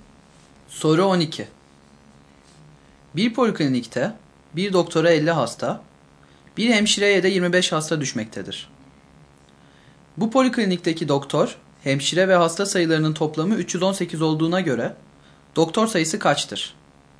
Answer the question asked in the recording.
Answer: Doğru yanıt E şıkkı.